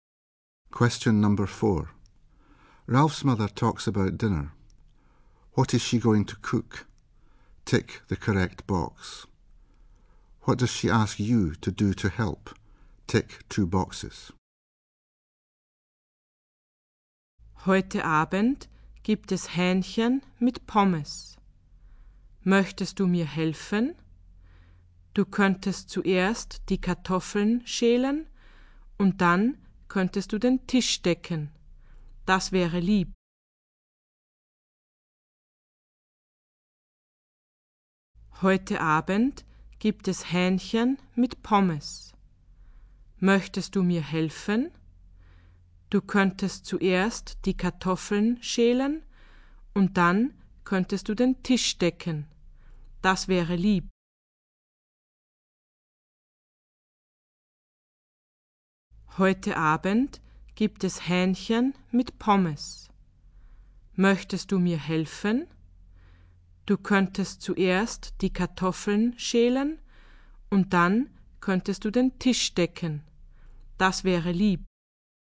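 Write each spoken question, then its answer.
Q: What is she going to cook?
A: Chicken and chips

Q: What does she ask you to do to help?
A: Peel the potatoes and set the table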